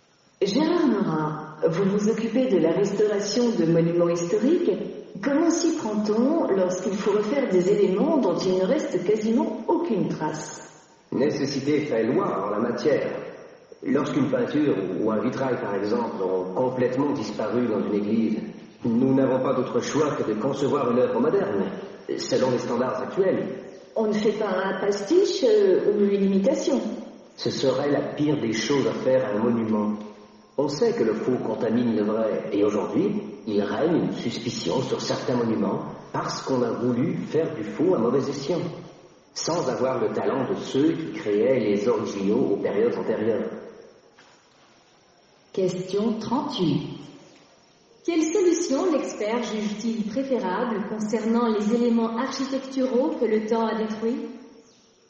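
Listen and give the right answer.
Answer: Concevoir une œuvre moderne, selon les standards actuels, plutôt qu'une imitation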